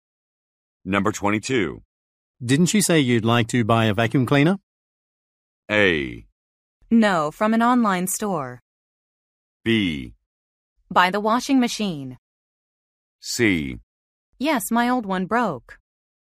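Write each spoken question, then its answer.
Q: Didn't you say you'd like to buy a vacuum cleaner?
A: C: Yes, my old one broke.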